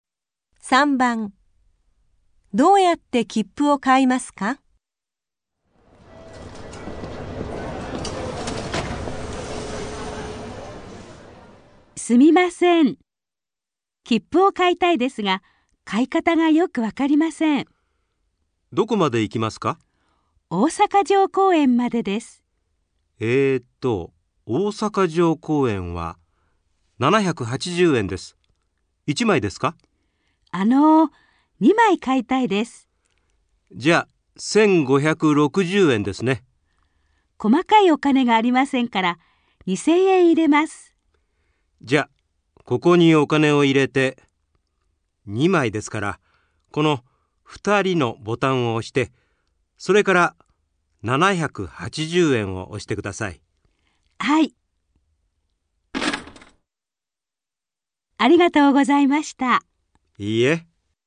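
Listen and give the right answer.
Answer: お金(2000円)を入れて、2人のボタンを押して、それから780円のボタンを押す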